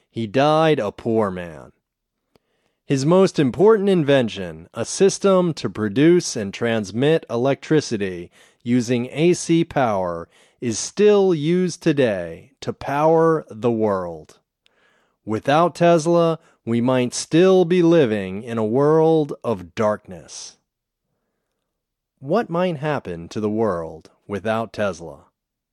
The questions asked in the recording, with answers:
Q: What might happen to the world without Tesla?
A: Without Tesla, we might be living in a world of darkness.